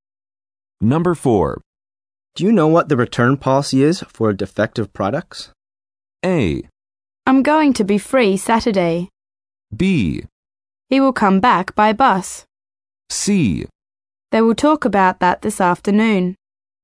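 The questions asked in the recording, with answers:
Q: Do you know what the return policy is for defective products?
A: C: They will talk about that this afternoon.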